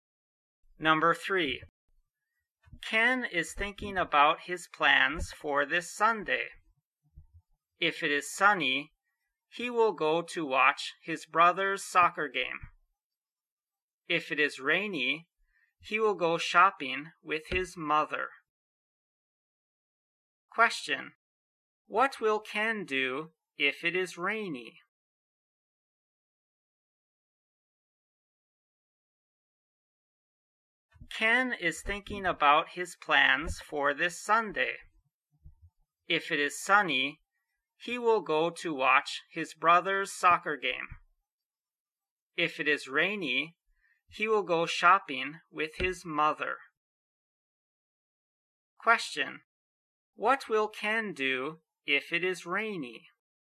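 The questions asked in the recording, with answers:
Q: What will Ken do if it is rainy?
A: He will go shopping with his mother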